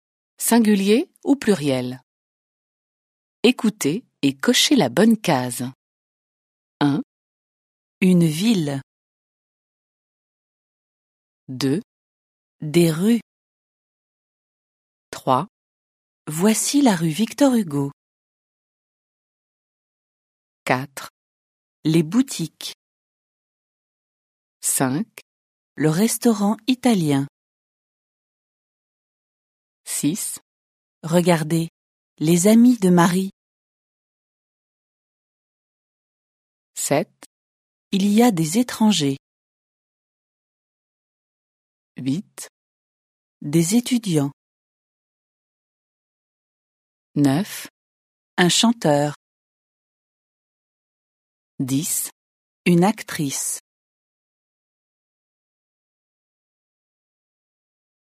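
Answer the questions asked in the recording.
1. singulier
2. pluriel
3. singulier
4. pluriel
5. singulier
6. pluriel
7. pluriel
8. pluriel
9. singulier
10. singulier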